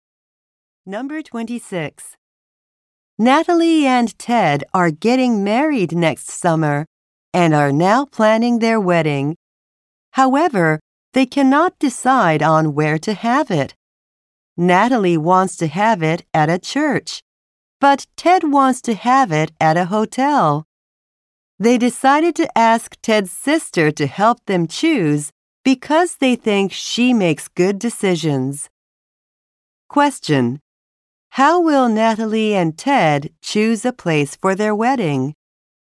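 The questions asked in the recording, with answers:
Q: How will Natalie and Ted choose a place for their wedding?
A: They will ask Ted's sister to help them choose.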